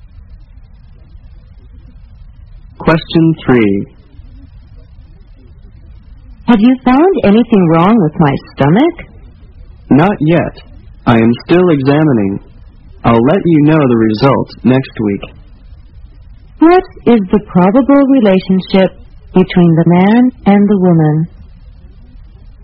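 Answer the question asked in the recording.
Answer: Doctor and patient.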